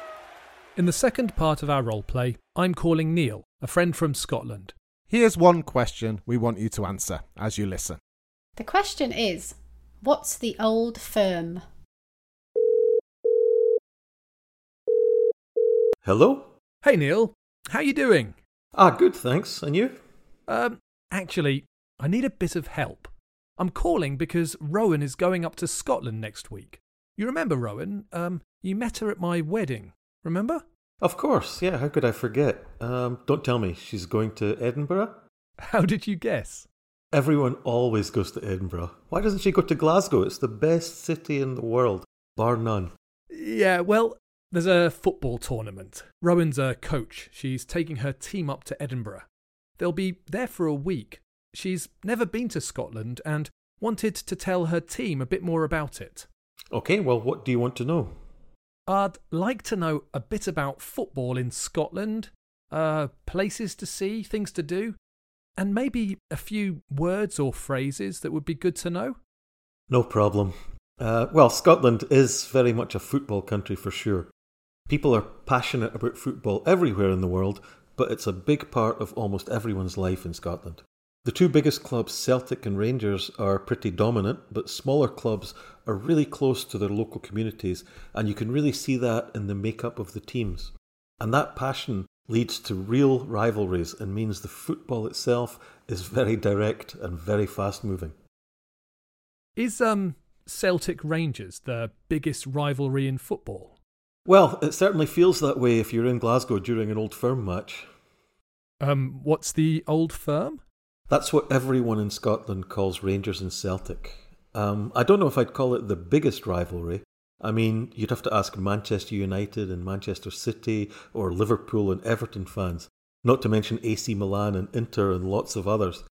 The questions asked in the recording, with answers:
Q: what's the old firm?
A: The answer is two football clubs from Glasgow, Celtic and Rangers.